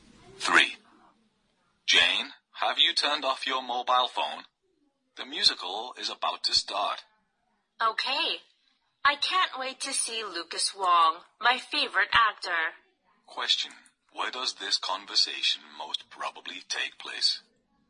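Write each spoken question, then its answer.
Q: Where does this conversation most probably take place?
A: In a theater.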